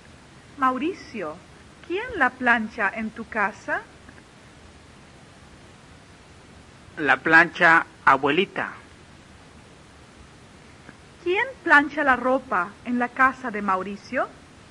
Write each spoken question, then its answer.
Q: ¿Quién plancha la ropa en la casa de Mauricio?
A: Abuelita plancha la ropa, o la plancha abuelita.